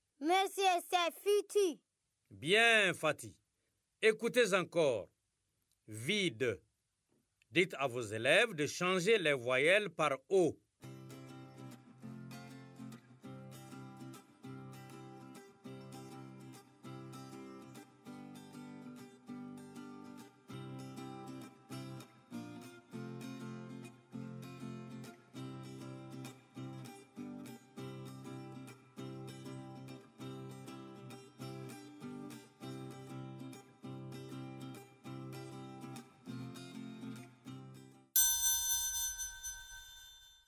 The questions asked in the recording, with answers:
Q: Vide. Dites à vos élèves de changer les voyelles par O.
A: Ça fait vodo, monsieur.